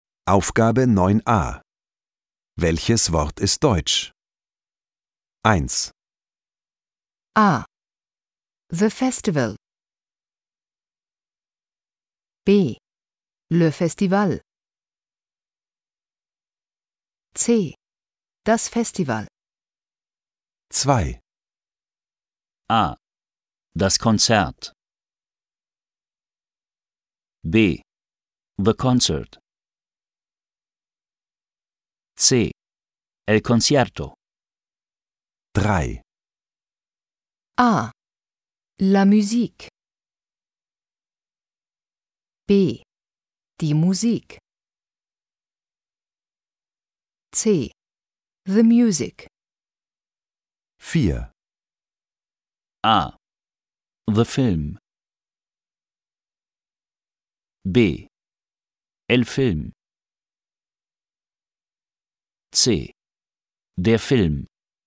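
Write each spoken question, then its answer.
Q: Welches Wort ist deutsch?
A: C: Das Festival.

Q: Welches Wort ist deutsch?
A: A: Das Konzert.

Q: Welches Wort ist deutsch?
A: B: Die Musik.

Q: Welches Wort ist deutsch?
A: C: Der Film.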